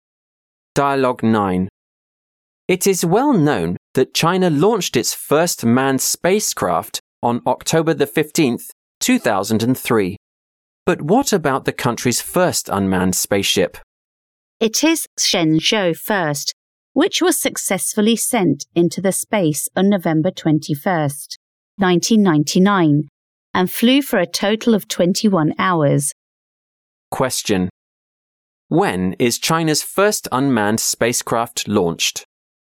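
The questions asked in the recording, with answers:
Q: When is China's first unmanned spacecraft launched?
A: November 21st, 1999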